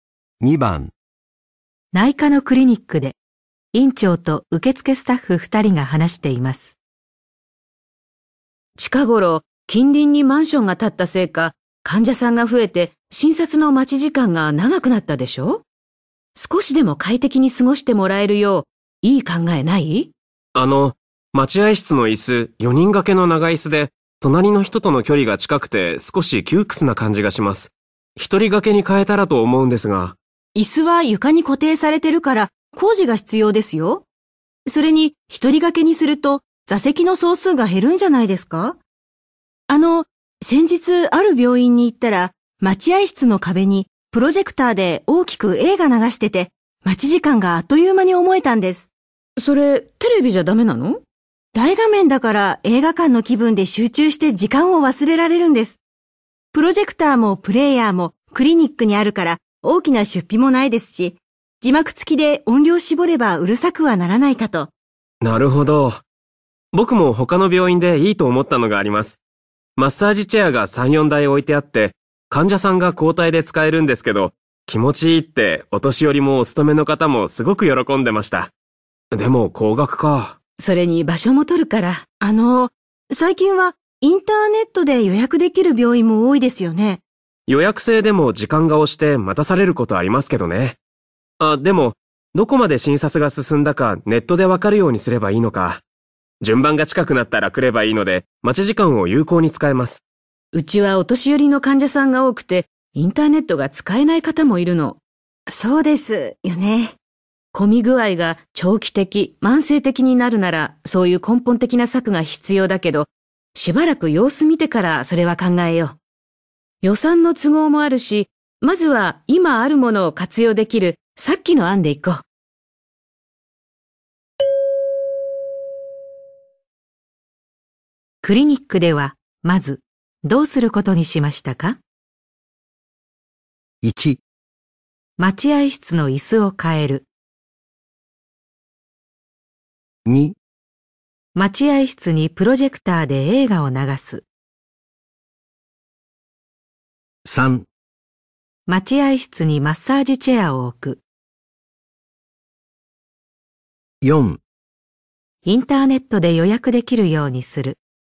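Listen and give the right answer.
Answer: 2: 待合室にプロジェクターで映画を流す。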